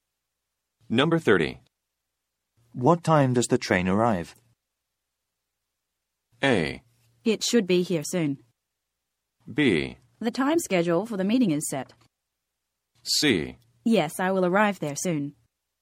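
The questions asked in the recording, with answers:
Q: What time does the train arrive?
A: A: It should be here soon.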